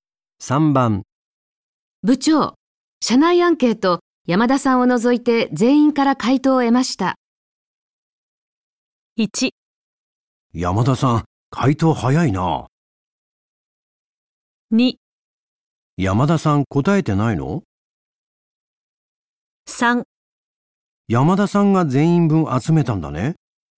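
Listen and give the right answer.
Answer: 2: 山田さん答えてないの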